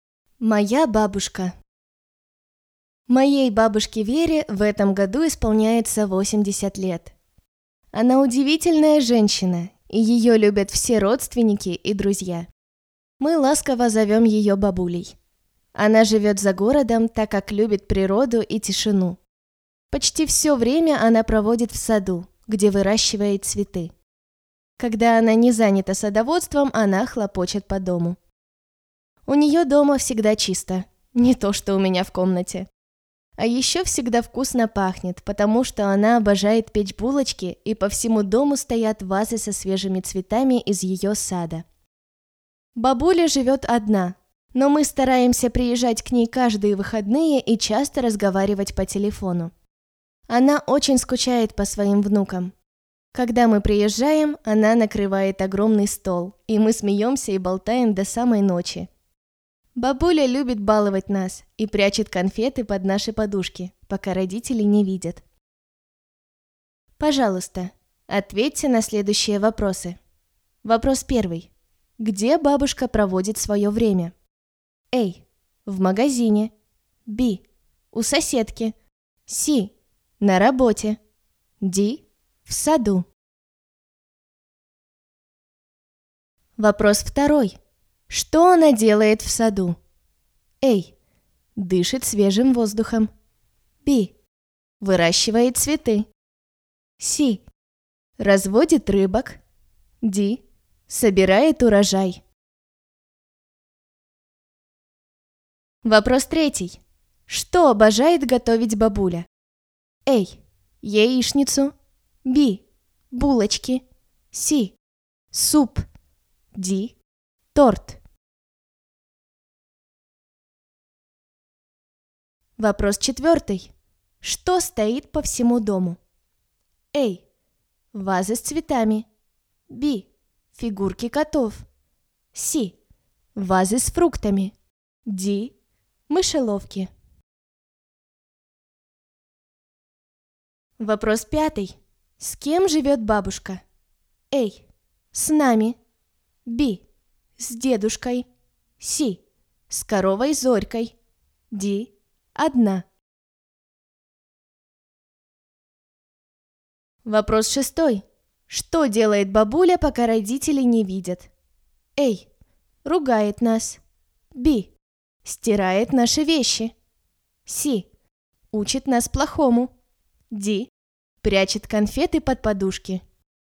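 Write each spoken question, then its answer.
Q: Где бабушка проводит свое время?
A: D: В саду.

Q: Что она делает в саду?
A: B: Выращивает цветы.

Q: Что обожает готовить бабуля?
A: B: Булочки.

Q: Что стоит по всему дому?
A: A: Вазы с цветами.

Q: С кем живет бабушка?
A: D: Одна.

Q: Что делает бабуля, пока родители не видят?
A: D: Прячет конфеты под подушки.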